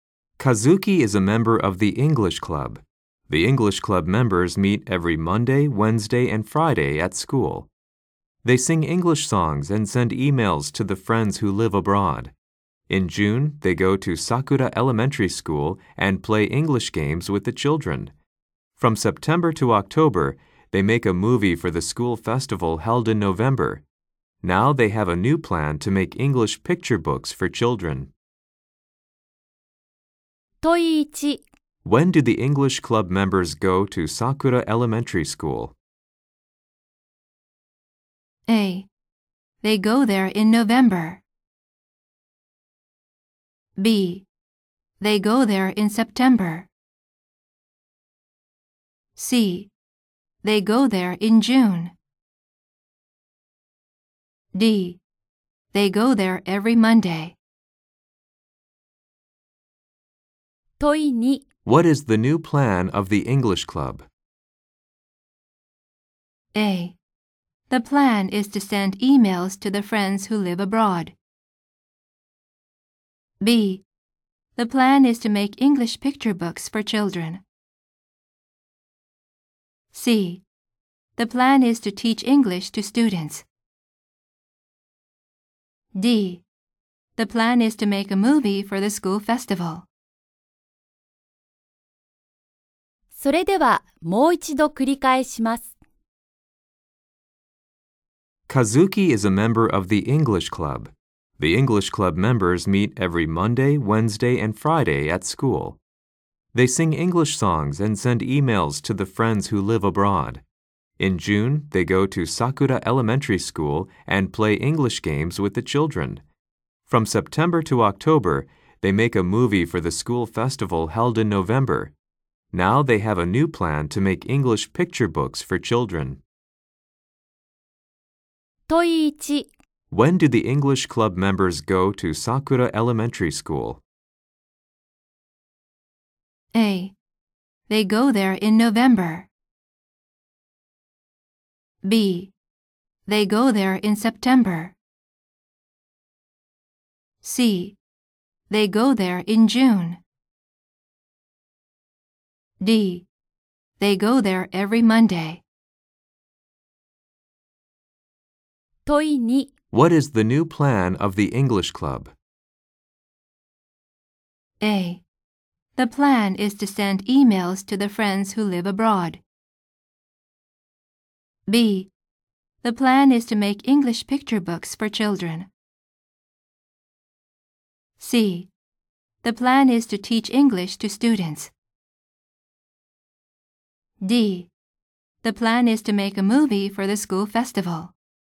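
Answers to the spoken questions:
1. C: They go there in June.
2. B: The plan is to make English picture books for children.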